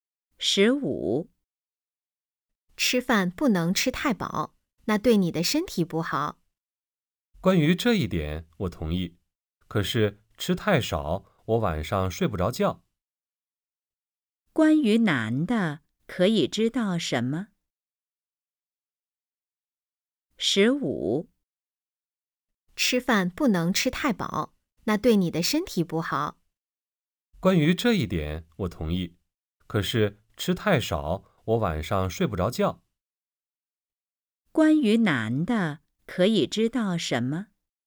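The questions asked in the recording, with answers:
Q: 关于男的可以知道什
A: 吃太少晚上睡不着觉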